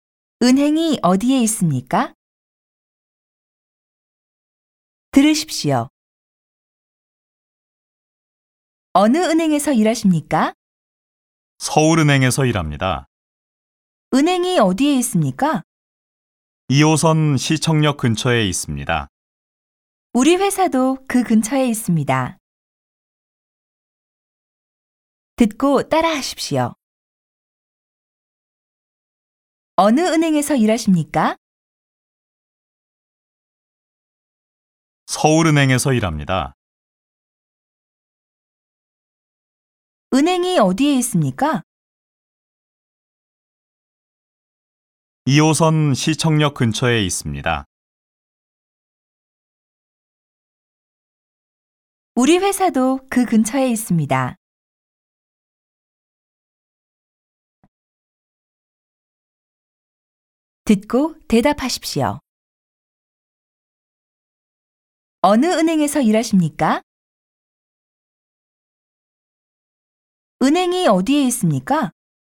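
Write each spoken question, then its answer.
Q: 어느 은행에서 일하십니까?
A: 서울은행에서 일합니다.

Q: 은행이 어디에 있습니까?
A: 2호선 시청역 근처에 있습니다.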